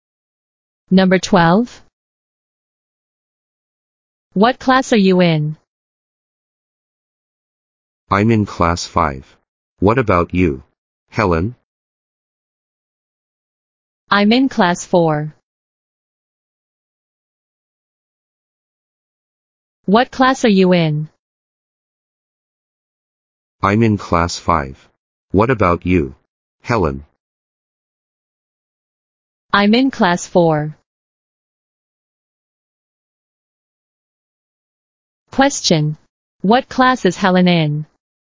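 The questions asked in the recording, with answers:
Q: Question. What class is Helen in?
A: Class 4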